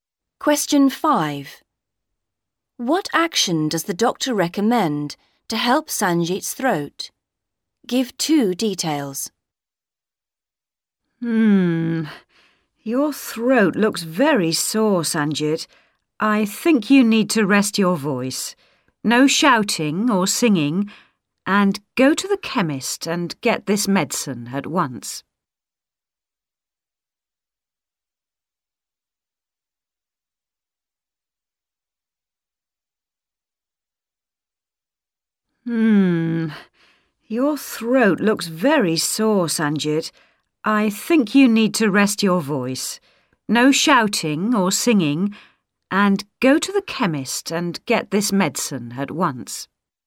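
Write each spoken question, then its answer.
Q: What action does the doctor recommend to help Sanjit's throat?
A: Rest his voice (no shouting or singing) and get medicine from the chemist at once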